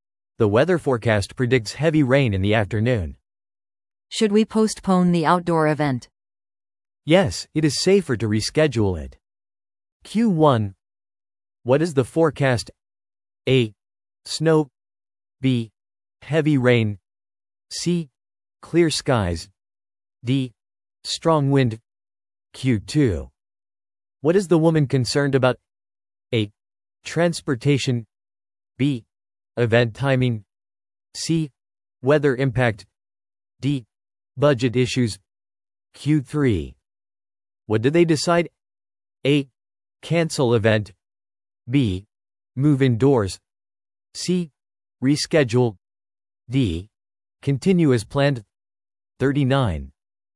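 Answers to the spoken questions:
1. B: Heavy rain.
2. C: Weather impact.
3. C: Reschedule.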